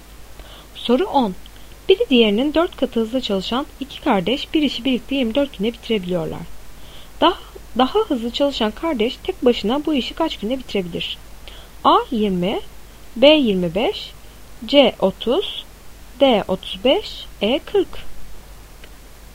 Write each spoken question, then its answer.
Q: Daha hızlı çalışan kardeş tek başına bu işi kaç günde bitirebilir?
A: Doğru cevap C 30.